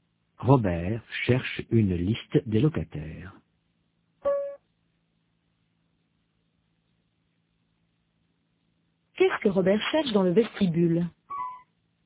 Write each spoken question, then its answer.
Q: Qu'est-ce que Robert cherche dans le vestibule?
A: Une liste des locataires.